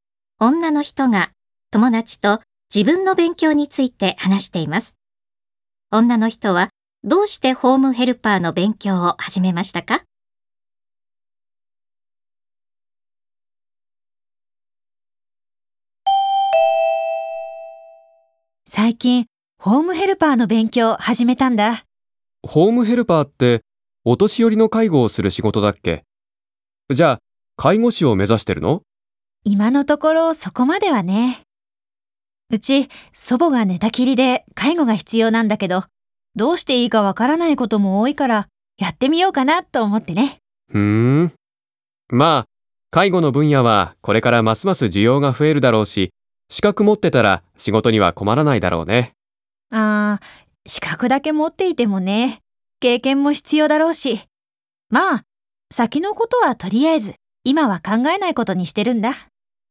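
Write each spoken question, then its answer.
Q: 女の人はどうしてホームヘルパーの勉強を始めましたか?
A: 寝たきりの祖母の介護に役立てたいから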